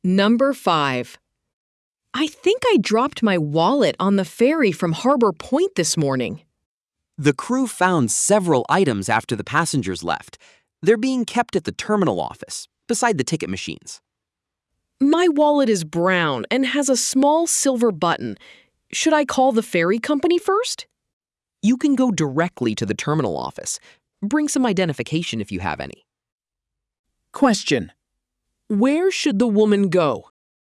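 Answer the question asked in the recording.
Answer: The terminal office, beside the ticket machines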